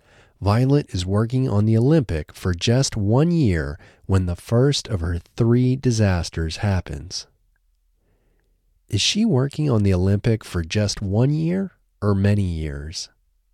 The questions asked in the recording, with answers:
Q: Is she working on the Olympic for just 1 year or many years?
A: She is working on the Olympic for just 1 year.